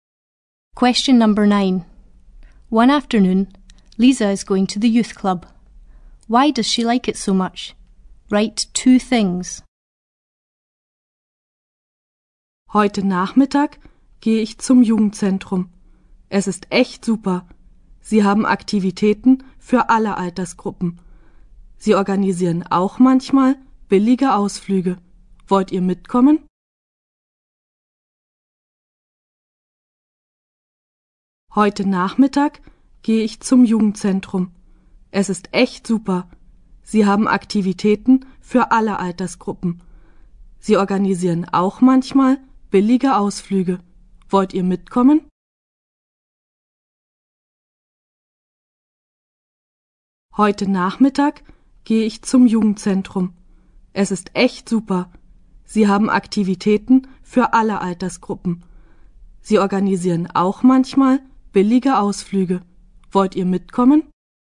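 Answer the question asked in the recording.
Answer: It has activities for all age groups; it sometimes organises cheap trips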